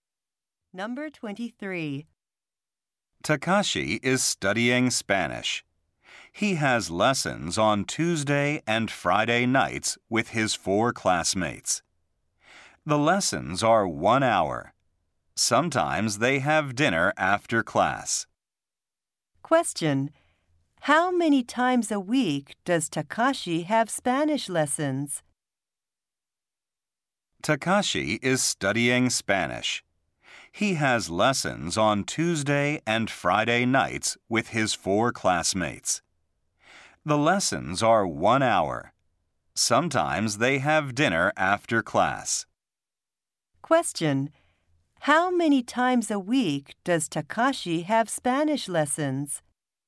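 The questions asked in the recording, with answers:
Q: How many times a week does Takashi have Spanish lessons?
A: Twice.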